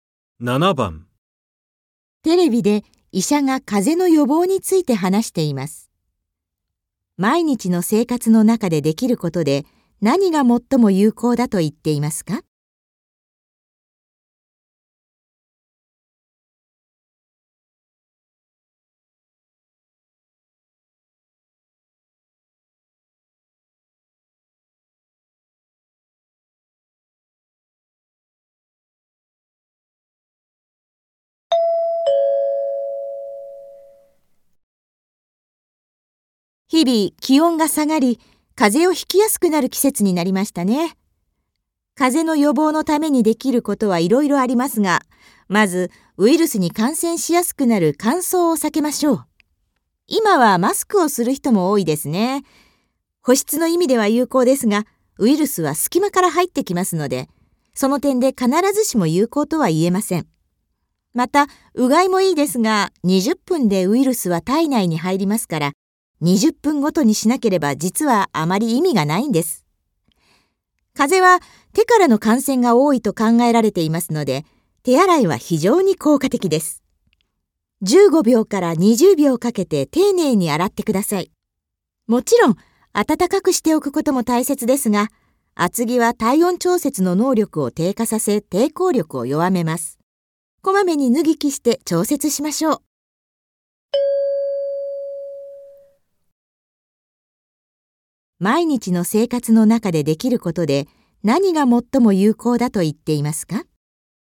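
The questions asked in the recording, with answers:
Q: 毎日の生活の中でできることで何が最も有効だと言っていますか?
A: 手洗い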